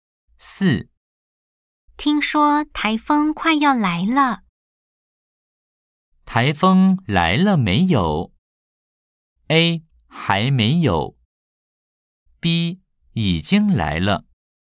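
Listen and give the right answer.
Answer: A: 还没有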